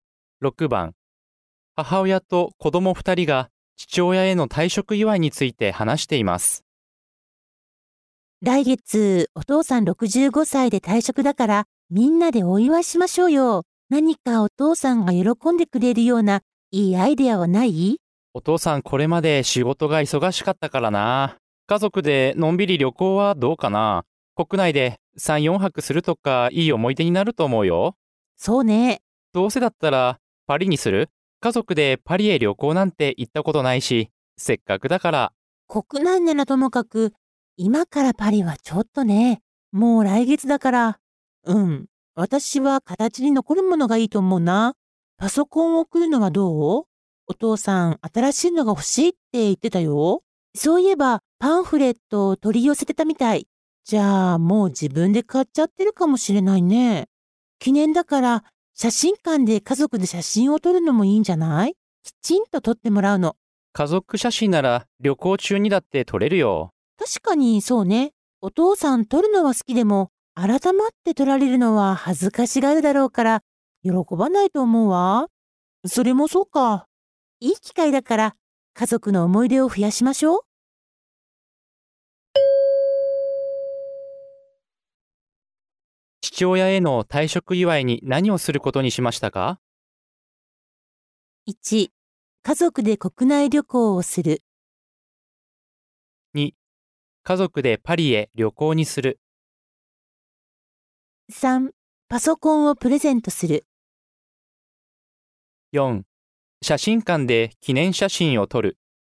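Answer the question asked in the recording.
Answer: 1: 家族で国内旅行をする。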